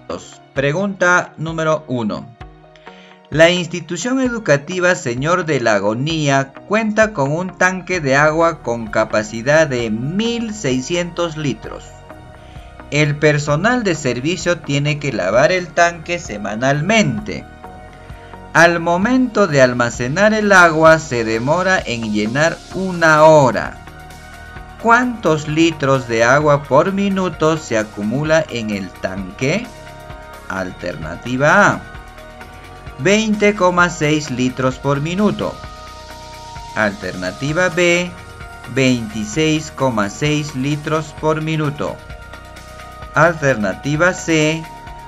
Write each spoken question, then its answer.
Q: ¿Cuántos litros de agua por minuto se acumula en el tanque?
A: La alternativa B, profesor.